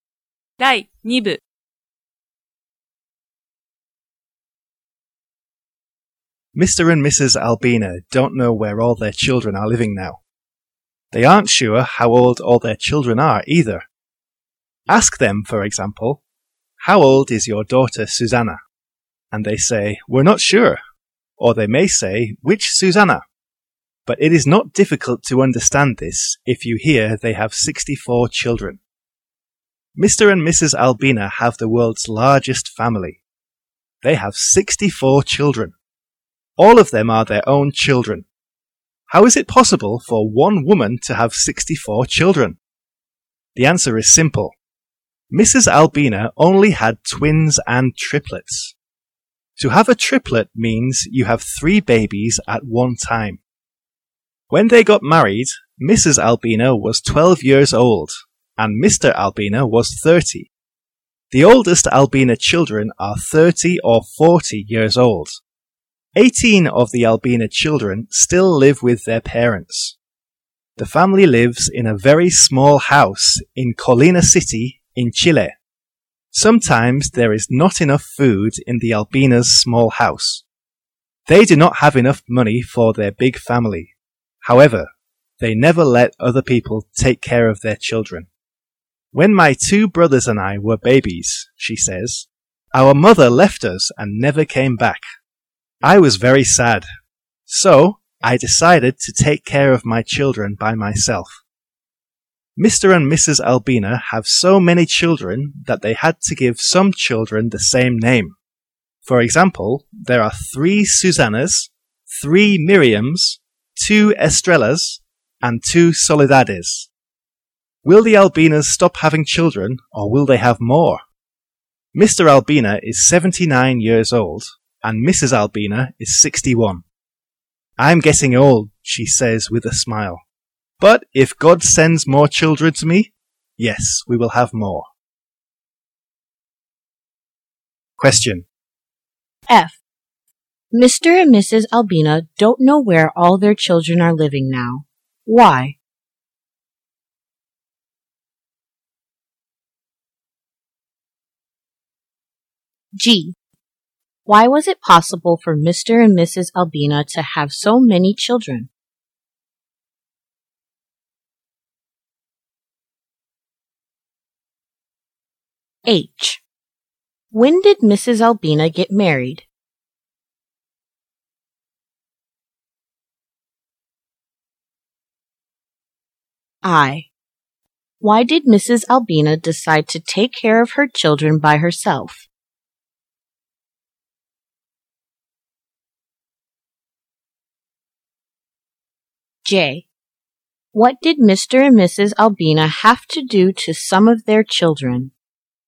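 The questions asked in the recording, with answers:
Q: Mr. and Mrs. Albina don't know where all their children are living now. Why?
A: Because they have 64 children.

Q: Why was it possible for Mr. and Mrs. Albina to have so many children?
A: Because Mrs. Albina only had twins and triplets.

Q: When did Mrs. Albina get married?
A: When she was 12 years old.

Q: Why did Mrs. Albina decide to take care of her children by herself?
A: Because her own mother left her and never came back, and she was very sad.

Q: What did Mr. and Mrs. Albina have to do to some of their children?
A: They had to give them the same name.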